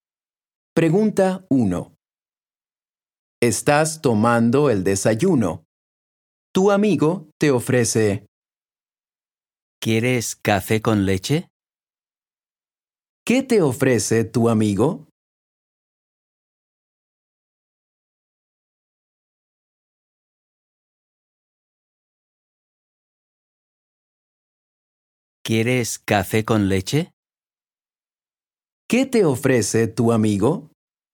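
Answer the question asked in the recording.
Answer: café con leche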